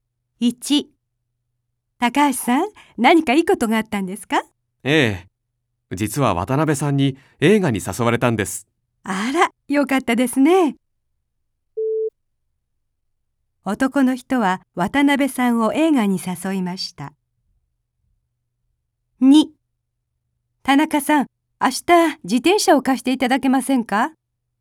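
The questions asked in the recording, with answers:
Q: 男の人は渡辺さんを映画に誘いました。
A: いいえ(間違い)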